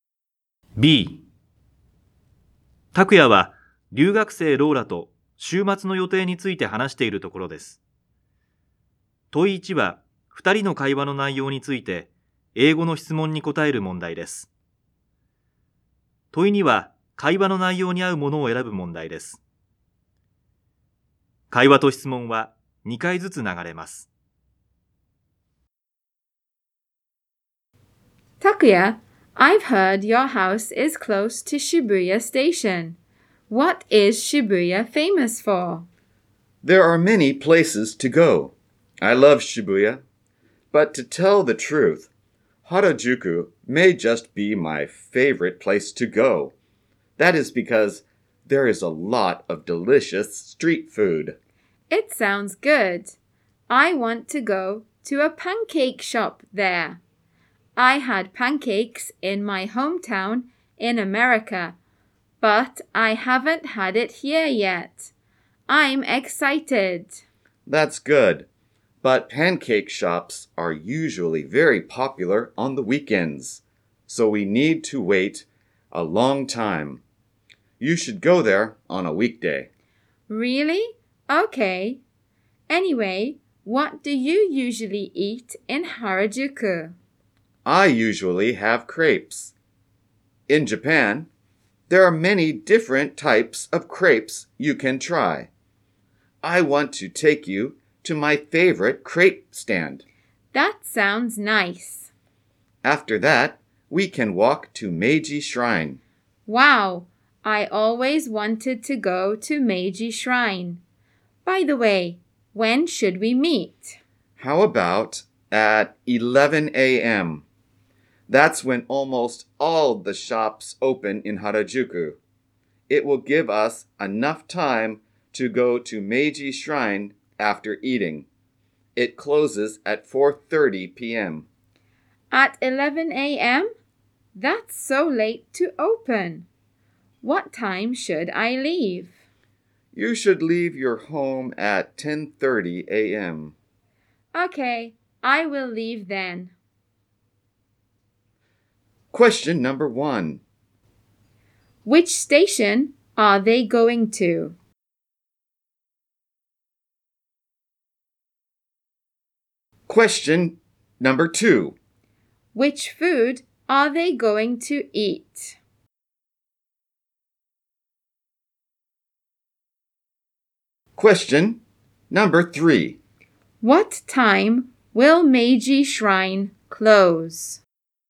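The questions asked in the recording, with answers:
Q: Which food are they going to eat?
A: Crepes

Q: What time will Meiji Shrine close?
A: At 4:30 p.m.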